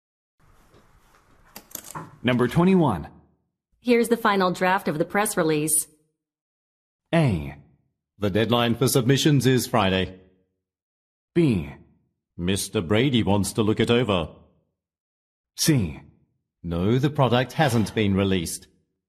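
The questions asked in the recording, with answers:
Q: Here's the final draft of the press release.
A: B: Mr. Brady wants to look it over.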